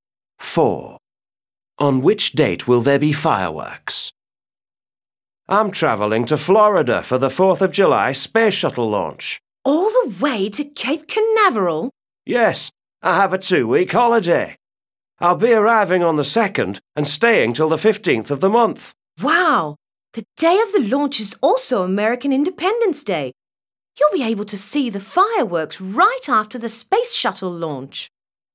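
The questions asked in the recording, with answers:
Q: On which date will there be fireworks?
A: The 4th of July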